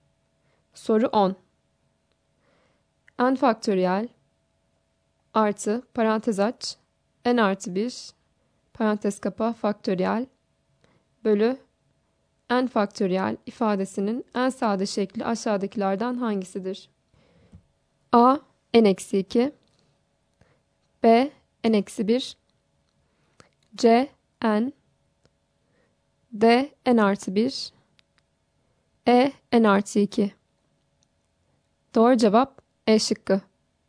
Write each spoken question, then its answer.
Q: N faktöriyel artı parantez aç N artı 1 parantez kapa faktöriyel bölü N faktöriyel ifadesinin en sade şekli aşağıdakilerden hangisidir?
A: Doğru cevap E şıkkı.